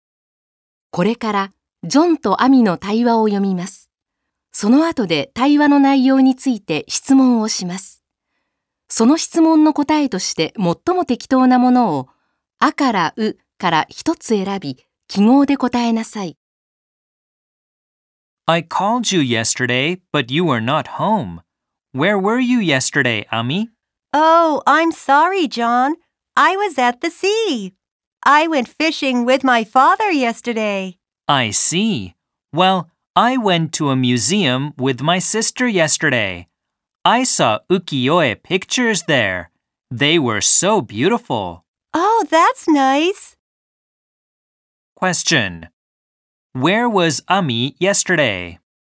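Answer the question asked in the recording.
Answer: At the sea.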